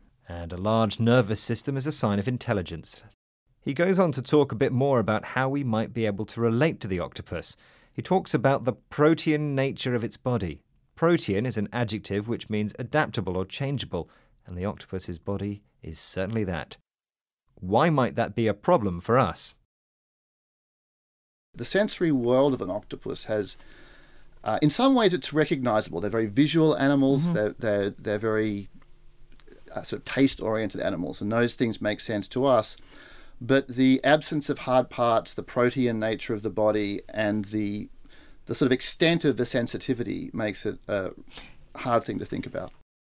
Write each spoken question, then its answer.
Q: Why might that be a problem for us?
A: But what's tricky for us is that its form is so completely different from ours.